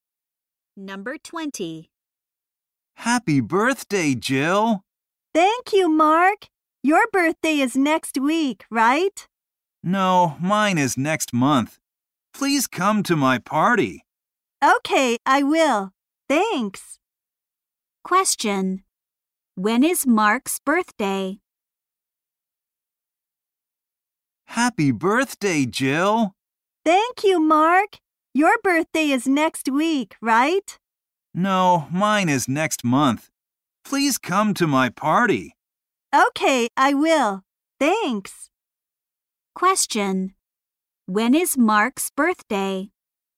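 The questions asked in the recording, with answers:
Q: Question. When is Mark's birthday?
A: Next month.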